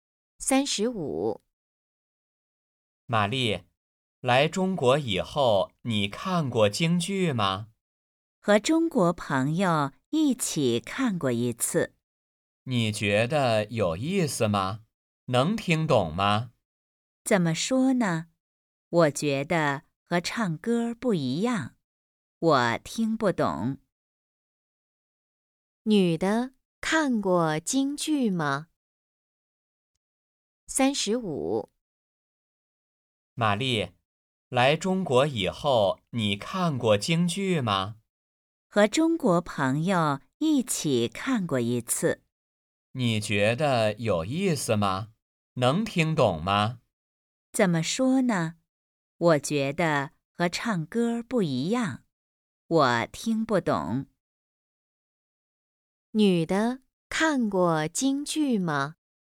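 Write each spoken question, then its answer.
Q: 女的看过京剧吗?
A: 看过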